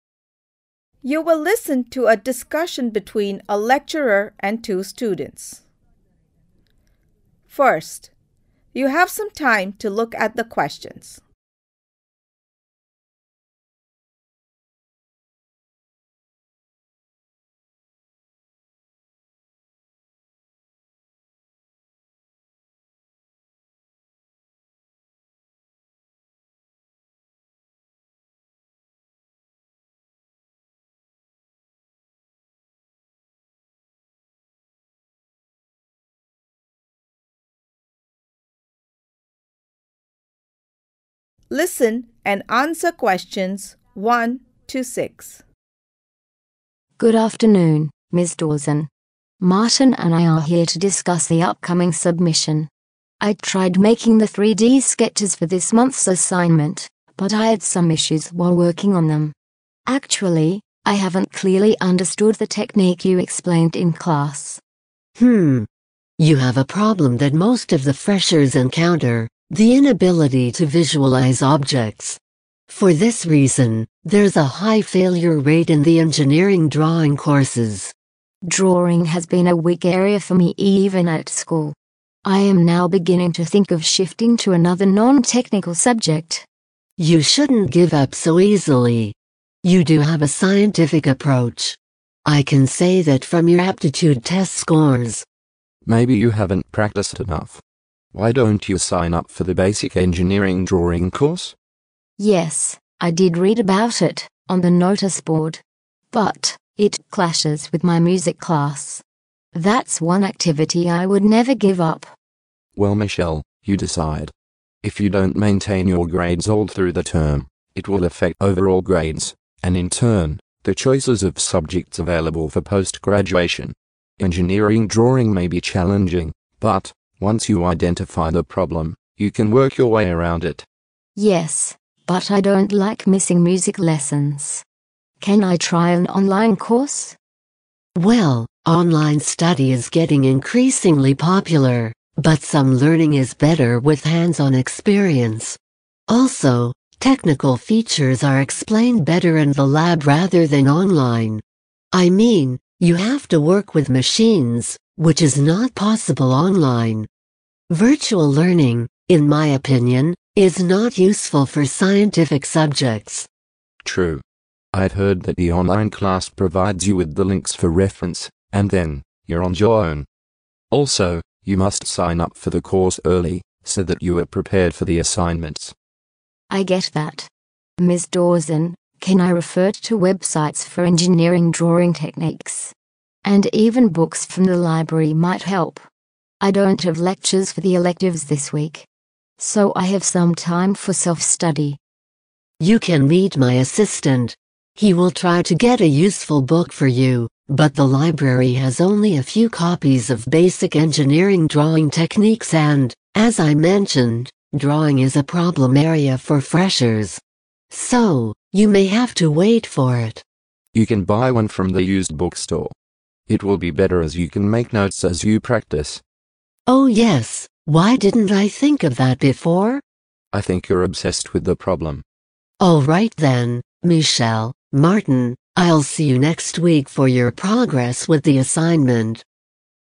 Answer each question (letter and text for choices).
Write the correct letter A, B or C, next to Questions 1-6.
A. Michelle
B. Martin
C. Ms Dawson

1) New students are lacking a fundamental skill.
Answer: C. Ms Dawson

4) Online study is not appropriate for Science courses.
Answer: C. Ms Dawson

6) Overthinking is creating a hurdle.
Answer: C. Ms Dawson